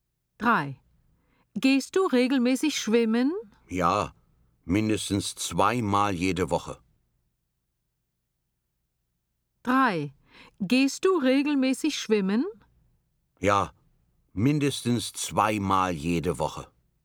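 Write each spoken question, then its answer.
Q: Gehst du regelmäßig schwimmen?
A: L: logisch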